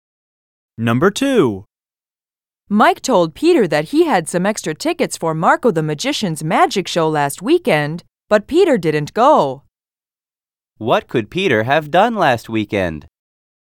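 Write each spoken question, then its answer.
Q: What could Peter have done last weekend?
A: He could have gone to Marco the Magician's magic show.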